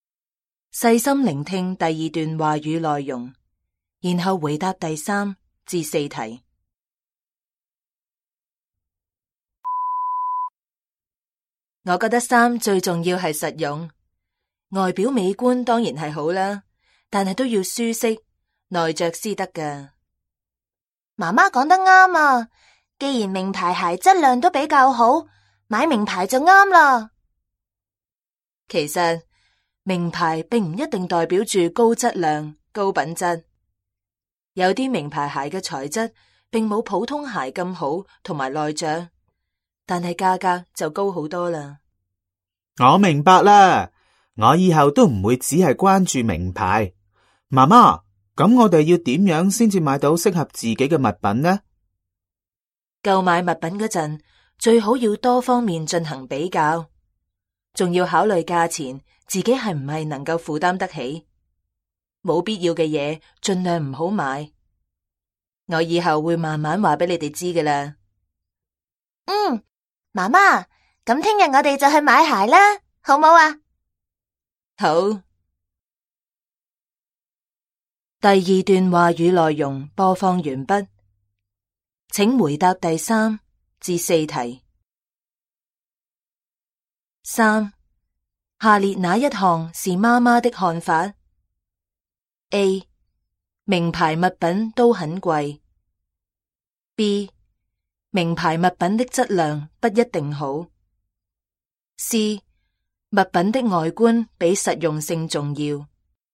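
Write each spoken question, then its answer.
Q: 下列哪一项是妈妈的看法? A. 名牌物品都很贵。 B. 名牌物品的质量不一定好。 C. 物品的外观比实用性重要。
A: B: 名牌物品的质量不一定好。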